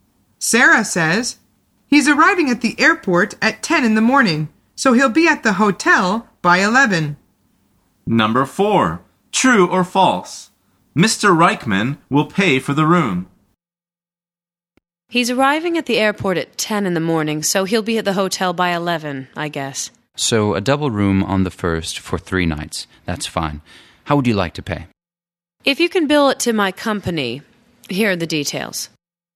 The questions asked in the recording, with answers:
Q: True or false? Mr. Reichman will pay for the room.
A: The answer is false.